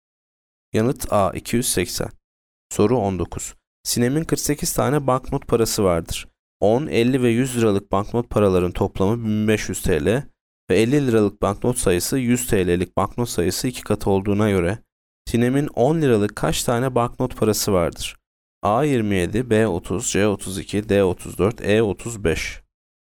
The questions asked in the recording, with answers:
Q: 10, 50 ve 100 liralık banknot paraların toplamı 1500 TL ve 50 liralık banknot sayısı 100 TL'lik banknot sayısı 2 katı olduğuna göre Sinem'in 10 liralık kaç tane banknot parası vardır?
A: Yanıt B 30.